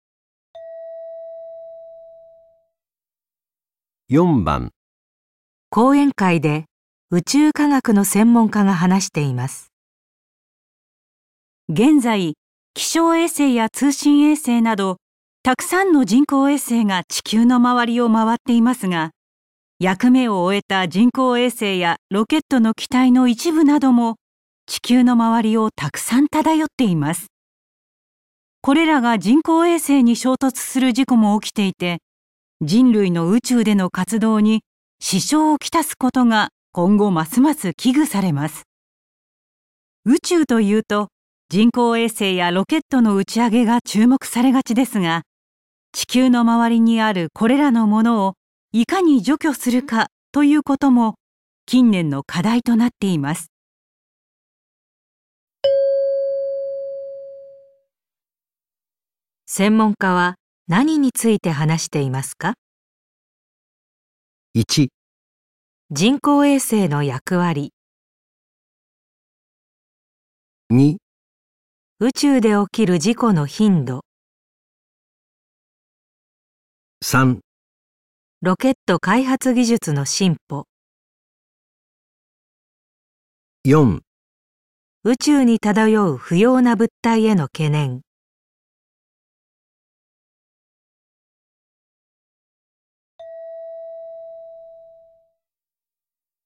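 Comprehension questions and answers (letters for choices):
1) 専門家は何について話していますか。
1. 人工衛星の役割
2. 宇宙で起きる事故の頻度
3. ロケット開発技術の進歩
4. 宇宙に漂う不要な物体への懸念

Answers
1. 4

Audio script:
これらは人工衛星に衝突する事故も 起きていて、人類の宇宙での活動に支障をきたすことが今後ますます危惧されます。 宇宙というと人工衛星や ロケットの打ち上げが注目されがちですが、 地球の周りにあるこれらのものをいかに除去するか、ということも 近年の課題となっています。

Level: N1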